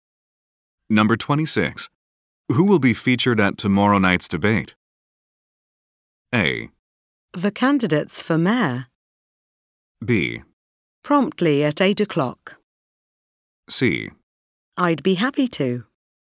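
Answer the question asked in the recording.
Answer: A: The candidates for mayor.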